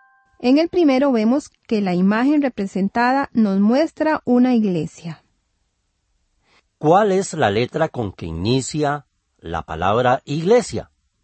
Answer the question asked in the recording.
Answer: Iglesia. Ajá, entonces esta palabra inicia con la letra I.